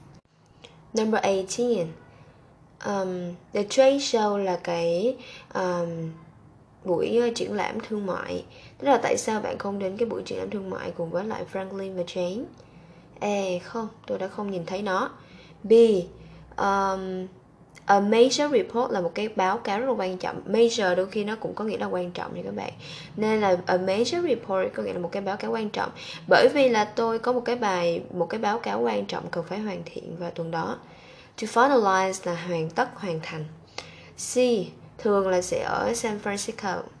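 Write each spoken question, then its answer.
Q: Tức là tại sao bạn không đến cái buổi triển lãm thương mại cùng với lại Franklin và Jane?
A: B: Bởi vì tôi có một báo cáo quan trọng cần hoàn thiện vào tuần đó.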